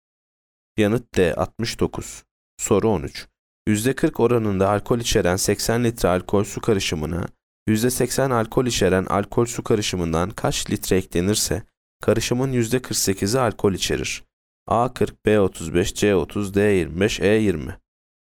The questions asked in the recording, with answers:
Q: %40 oranında alkol içeren 80 litre alkol su karışımına %80 alkol içeren alkol su karışımından kaç litre eklenirse karışımın %48'i alkol içerir?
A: Yanıt E 20.